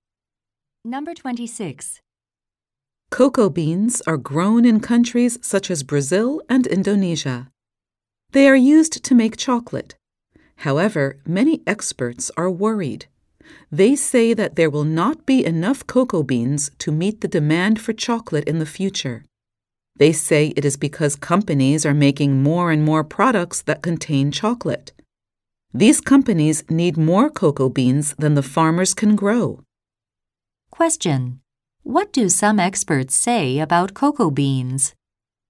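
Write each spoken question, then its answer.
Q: What do some experts say about cocoa beans?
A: There will not be enough to meet future demand for chocolate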